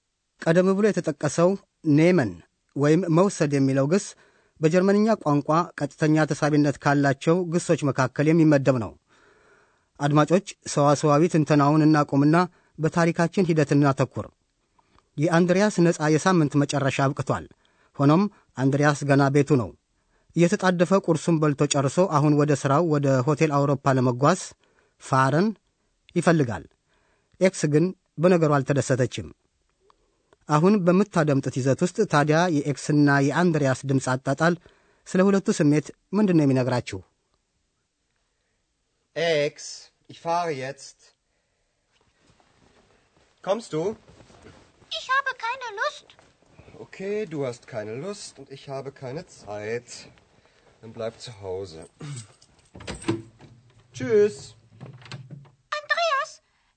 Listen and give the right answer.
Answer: ኤክስ ምንም አይነት ፍላጎት እንደሌላትና አንድሪያስም መረበሹን ተገነዘባችሁ?